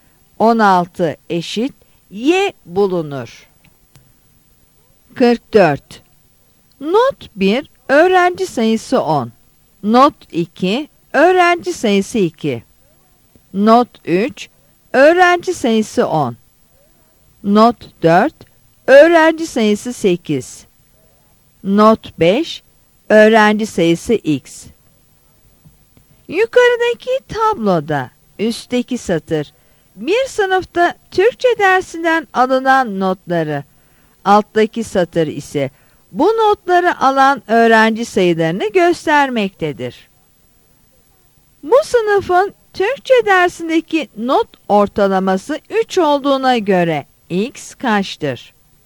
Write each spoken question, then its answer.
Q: Bu sınıfın Türkçe dersindeki not ortalaması 3 olduğuna göre x kaçtır?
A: Yanıt C'dir.